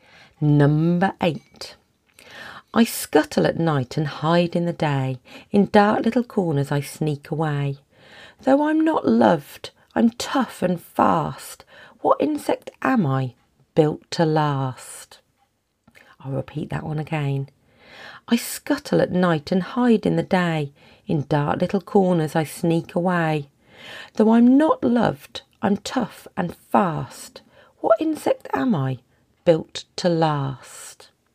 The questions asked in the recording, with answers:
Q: What insect am I, built to last?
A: The answer to that one is a cockroach.